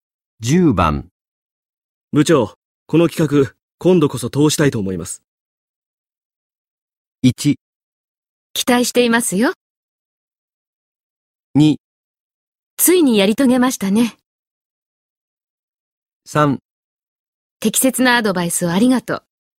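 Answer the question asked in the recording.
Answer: 1: 期待していますよ。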